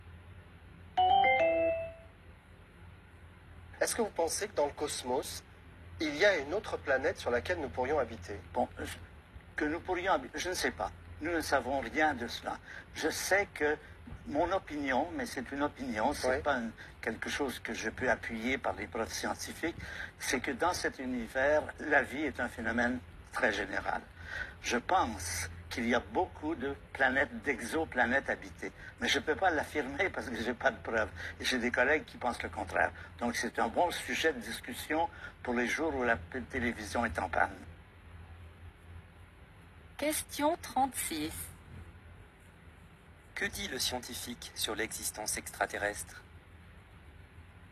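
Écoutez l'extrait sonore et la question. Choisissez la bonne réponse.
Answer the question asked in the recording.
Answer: Il pense que la vie est répandue mais n'a pas de preuves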